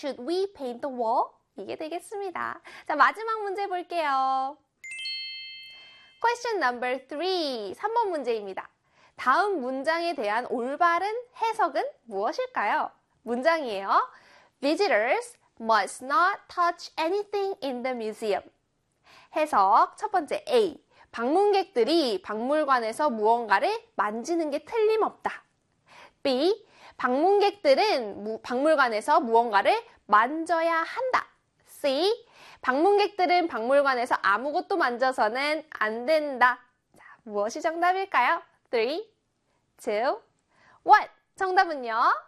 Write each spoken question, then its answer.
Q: 다음 문장에 대한 올바른 해석은 무엇일까요?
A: 그렇죠. C에 방문객들은 박물관에서 아무것도 만져서는 안 된다.